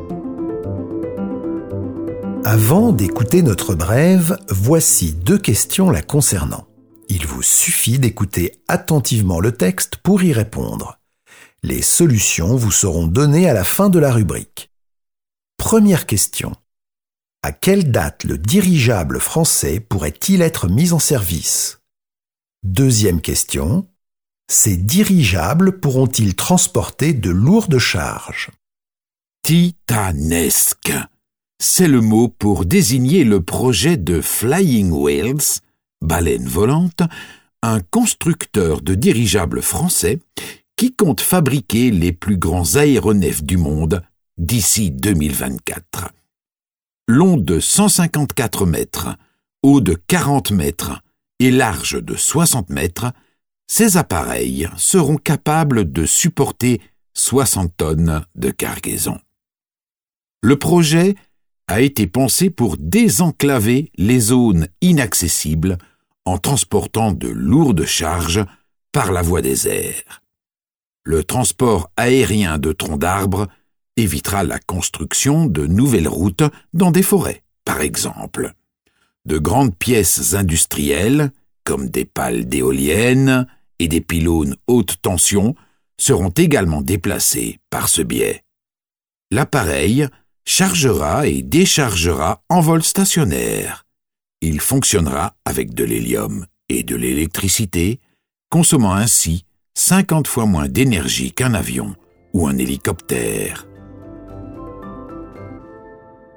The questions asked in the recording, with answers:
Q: À quelle date le dirigeable français pourrait-il être mis en service?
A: Le dirigeable français pourrait être mis en service d'ici 2024.

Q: Ces dirigeables pourront-ils transporter de lourdes charges?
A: Les dirigeables pourront transporter de lourdes charges allant jusqu'à 60 tonnes.